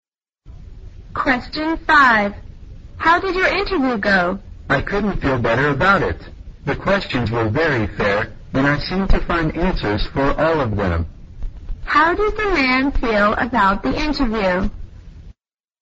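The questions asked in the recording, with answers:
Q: How did the man feel about the interview?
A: He felt very good and confident about it.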